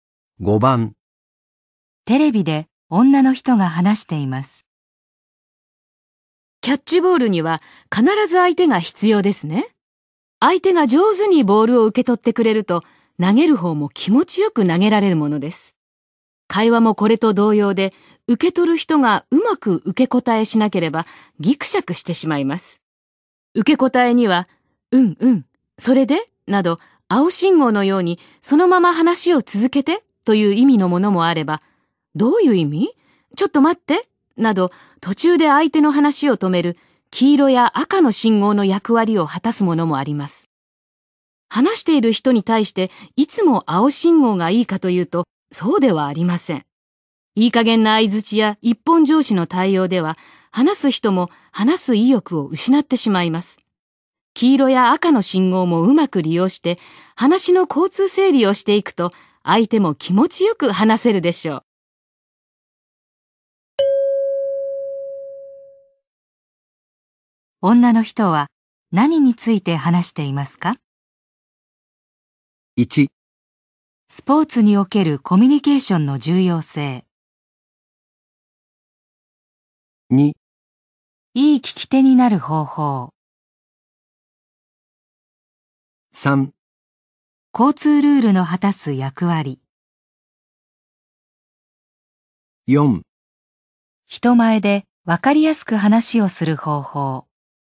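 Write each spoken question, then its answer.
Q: 女の人は何について話していますか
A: 2: いい聞き手になる方法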